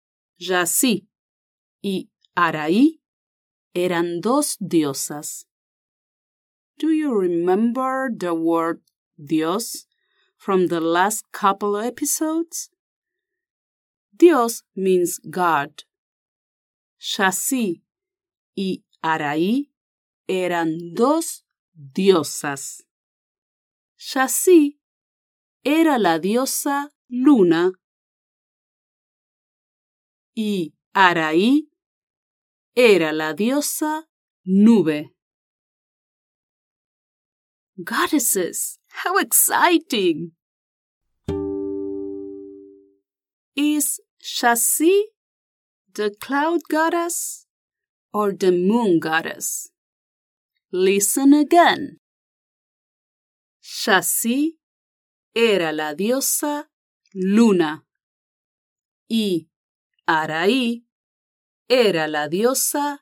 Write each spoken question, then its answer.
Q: Is the cloud goddess or the moon goddess?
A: Sí, the moon goddess.